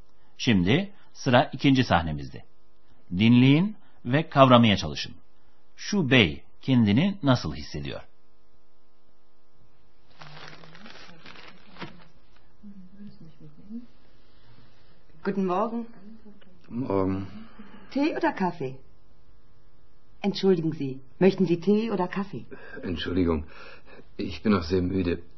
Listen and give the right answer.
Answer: uykusunu alamamış bir adam kahvaltıya geldi.